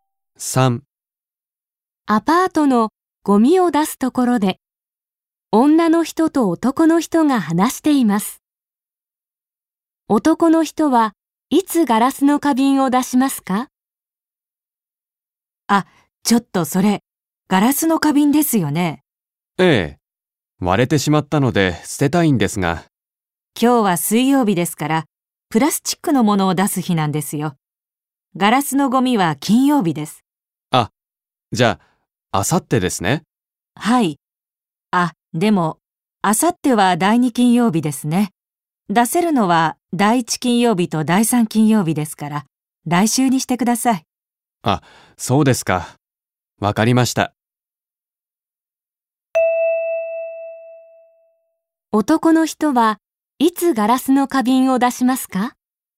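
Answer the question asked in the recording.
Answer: 来週の金曜日(第三金曜日)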